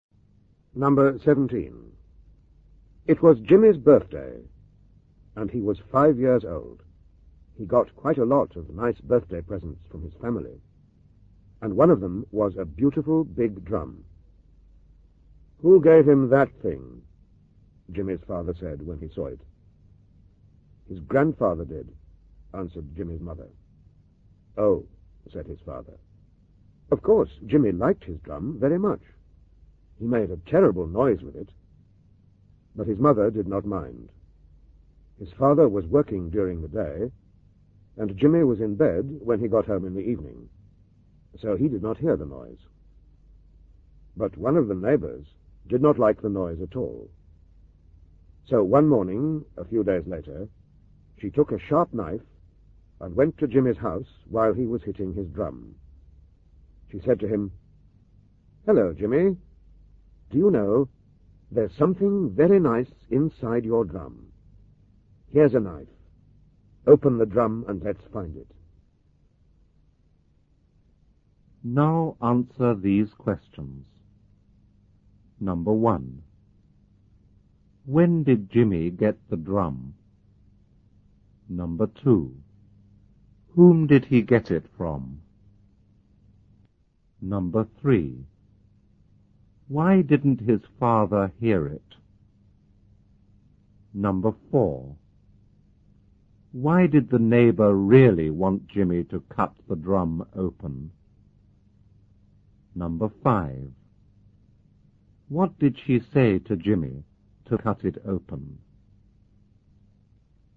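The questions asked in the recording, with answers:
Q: When did Jimmy get the drum?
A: On his fifth birthday

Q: Whom did he get it from?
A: His grandfather

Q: Why didn't his father hear it?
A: He was working during the day, and Jimmy was in bed when he got home

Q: Why did the neighbor really want Jimmy to cut the drum open?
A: She did not like the noise and wanted it to stop

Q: What did she say to Jimmy to cut it open?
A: That there was something very nice inside the drum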